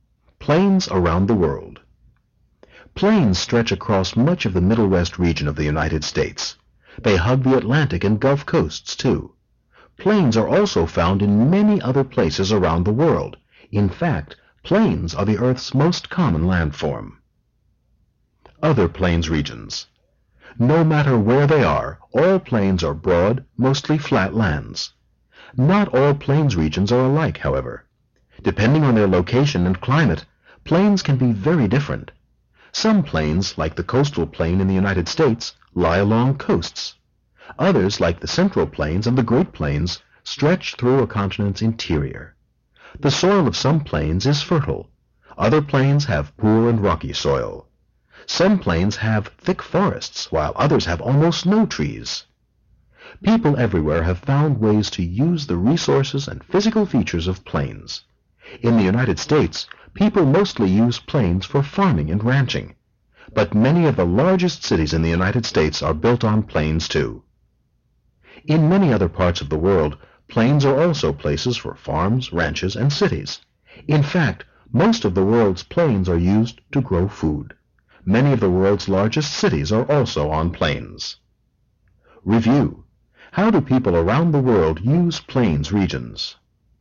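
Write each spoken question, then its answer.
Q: How do people around the world use plains regions?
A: For farming, ranching and cities; most plains are used to grow food.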